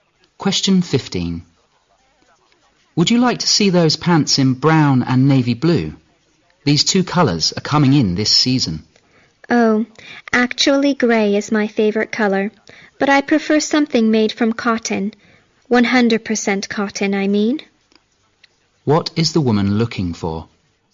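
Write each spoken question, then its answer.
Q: What is the woman looking for?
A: Grey pants made of 100% cotton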